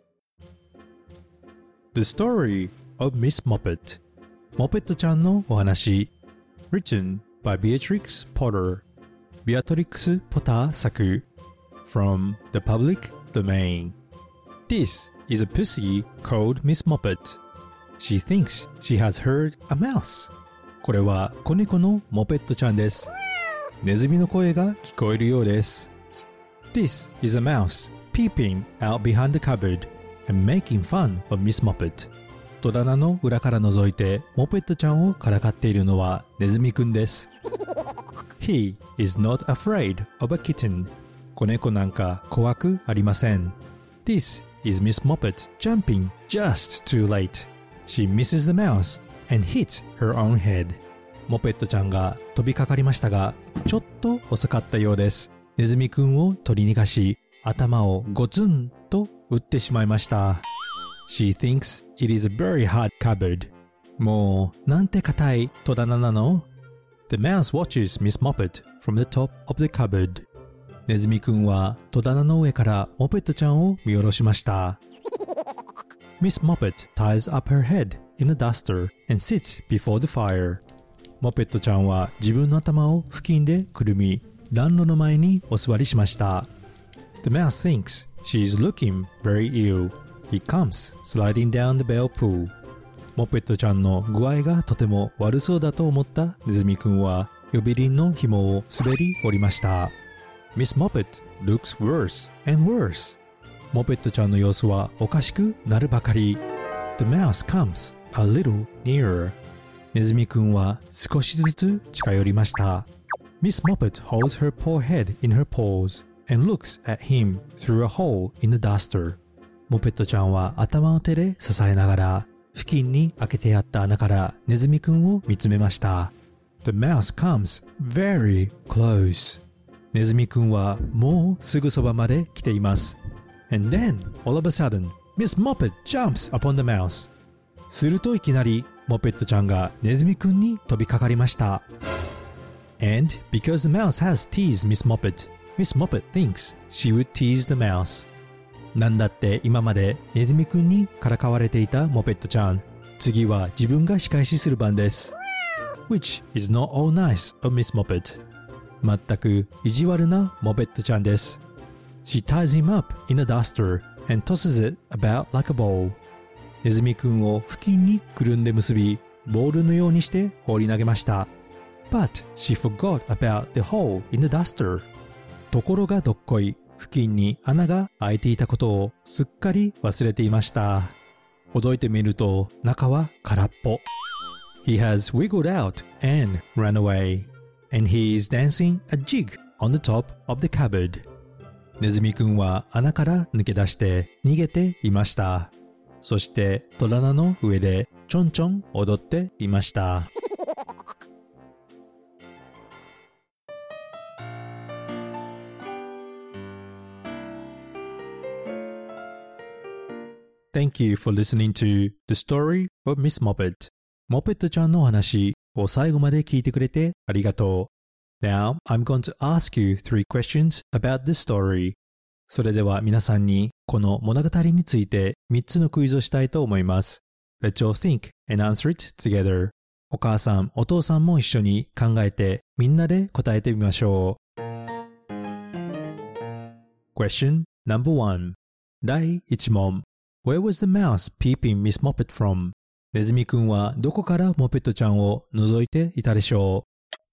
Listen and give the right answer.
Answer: From behind the cupboard 戸棚の裏から覗いていました。